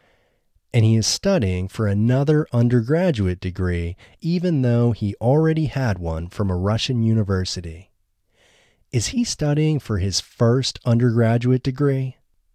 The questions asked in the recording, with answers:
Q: Is he studying for his first undergraduate degree?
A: No, he isn't studying for his first undergraduate degree.